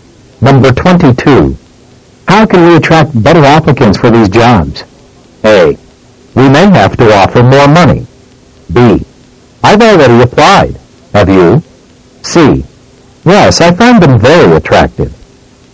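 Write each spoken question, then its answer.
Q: How can we attract better applicants for these jobs?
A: A: We may have to offer more money.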